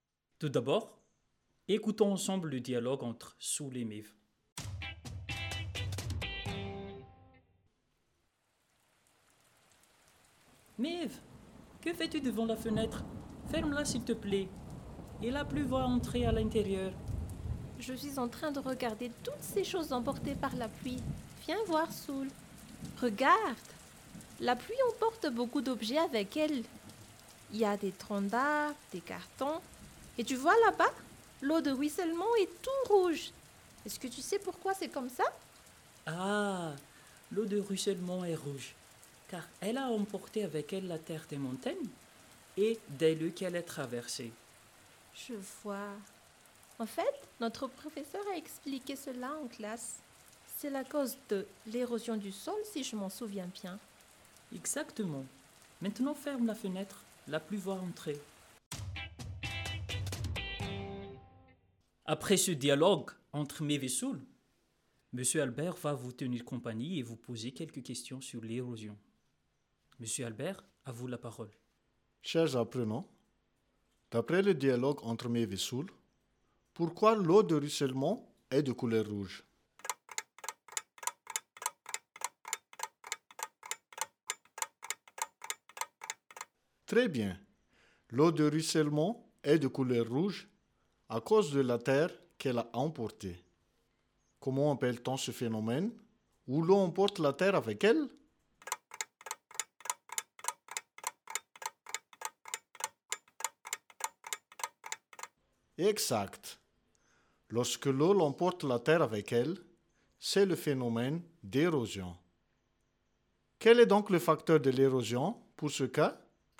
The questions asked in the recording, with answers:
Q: Chers apprenants, d'après le dialogue entre Mev et Soul, pourquoi l'eau de ruissellement est de couleur rouge?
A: L'eau de ruissellement est de couleur rouge à cause de la terre qu'elle a emportée.

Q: Quel est donc le facteur de l'érosion pour ce cas?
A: Le facteur de l'érosion, ici, c'est l'eau.